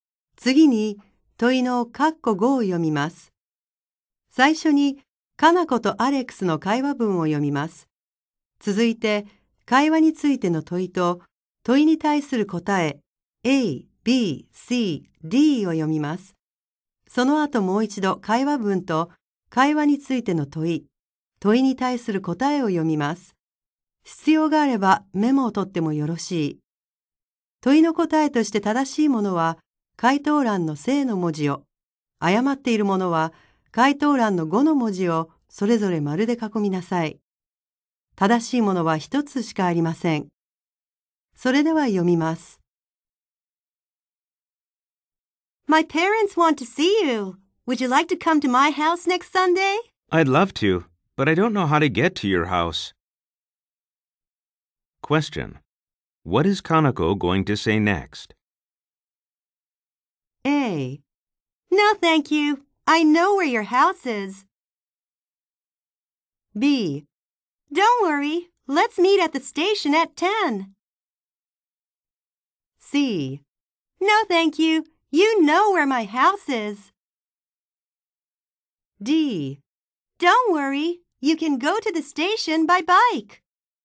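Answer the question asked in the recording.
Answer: B: Don't worry, let's meet at the station at 10.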